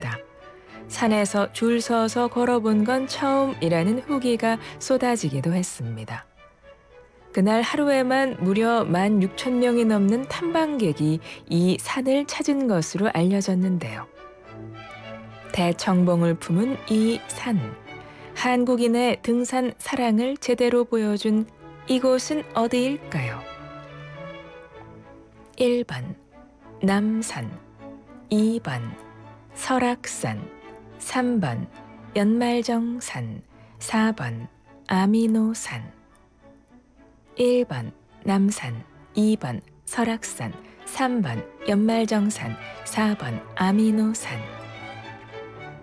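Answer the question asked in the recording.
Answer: 2번: 설악산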